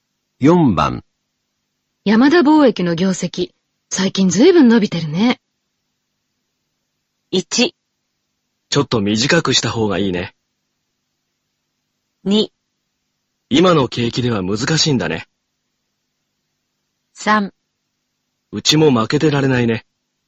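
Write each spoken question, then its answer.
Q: 山田貿易の業績、最近ずいぶん伸びてるね。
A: 3: うちも負けてられないね。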